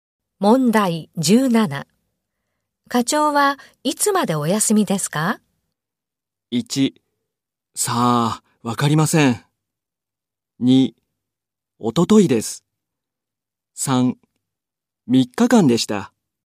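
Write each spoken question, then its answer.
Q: 課長はいつまでお休みですか?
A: 2: さあ、わかりません。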